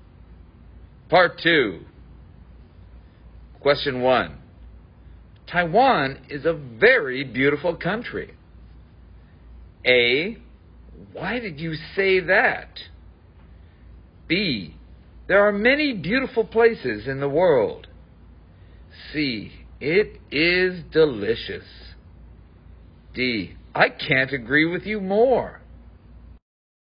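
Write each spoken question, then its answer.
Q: Taiwan is a very beautiful country.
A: D: I can't agree with you more.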